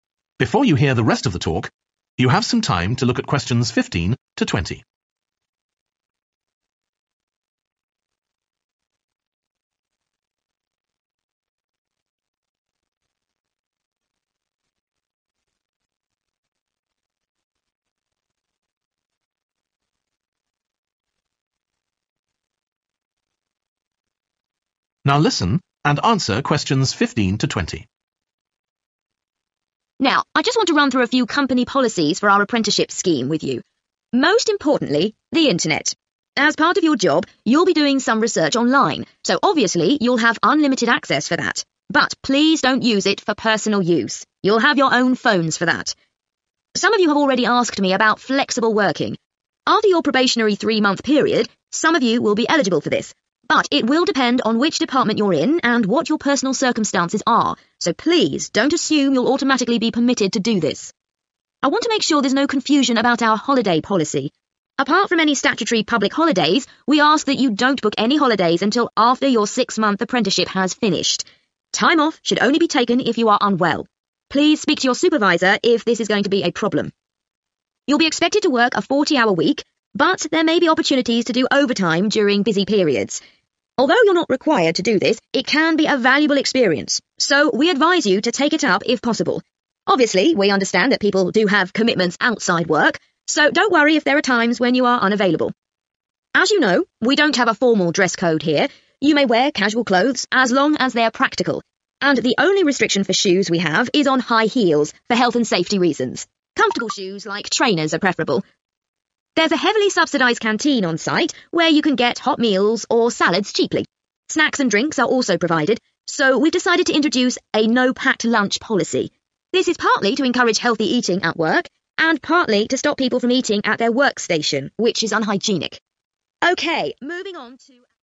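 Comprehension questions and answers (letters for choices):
Write the correct letter, A, B or C, next to Questions 15-20.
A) It is encouraged.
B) There are some restrictions.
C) It is against the rules.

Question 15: Using the internet ................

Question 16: Flexible working ................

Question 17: Booking holidays ................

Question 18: Working overtime ................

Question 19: Wearing trainers ................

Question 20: Bringing food to work ................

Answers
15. B
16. B
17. C
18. A
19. A
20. C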